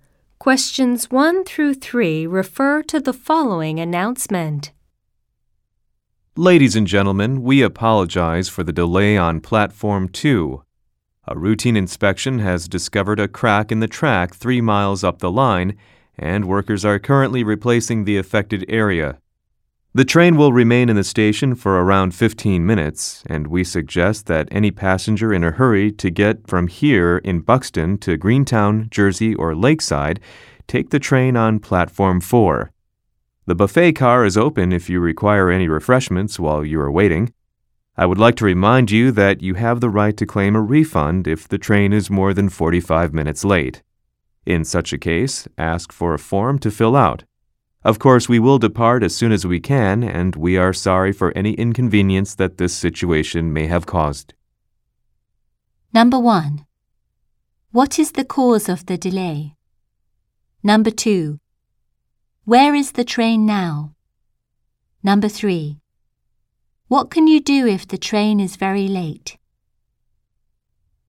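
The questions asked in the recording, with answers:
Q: What is the cause of the delay?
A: A crack in the track is being repaired

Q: Where is the train now?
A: In the station at Buxton, Platform 2

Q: What can you do if the train is very late?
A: Claim a refund by filling out a form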